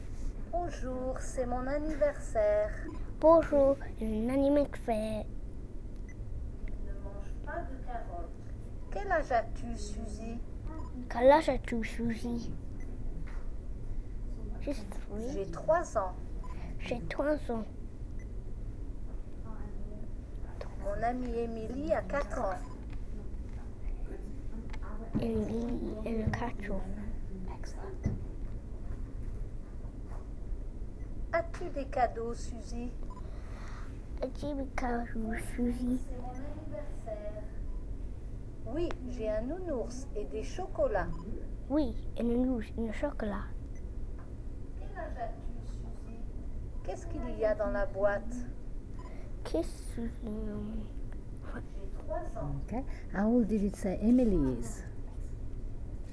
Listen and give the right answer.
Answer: Mon ami Emily a 4 ans.